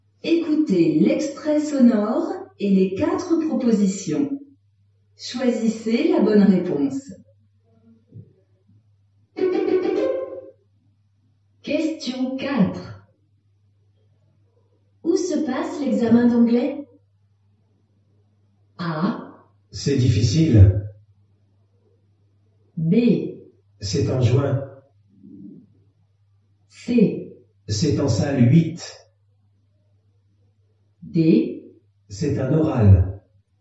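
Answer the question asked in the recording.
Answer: C: C'est en salle 8.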